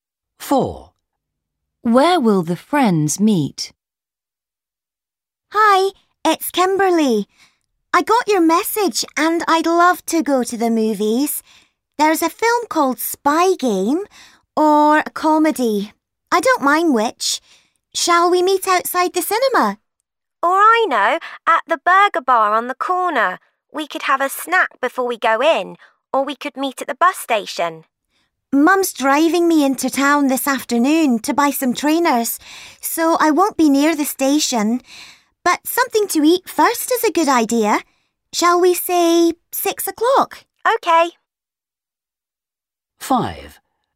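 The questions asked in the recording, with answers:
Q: Where will the friends meet?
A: At the burger bar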